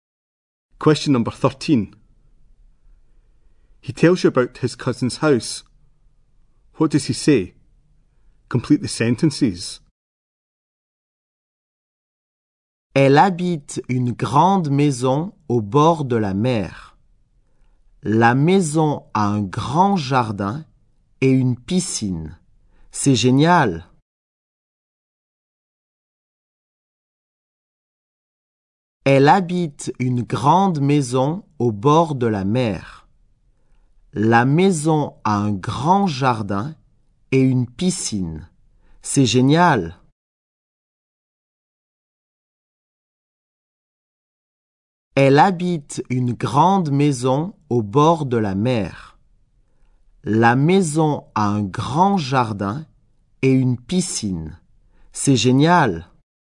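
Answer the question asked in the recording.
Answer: She lives in a big house by the sea with a big garden and a pool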